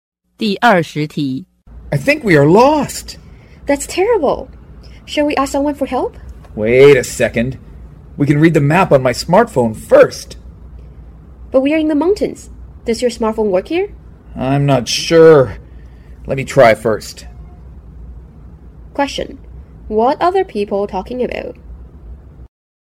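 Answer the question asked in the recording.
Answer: They are lost in the mountains and want to check the map on a smartphone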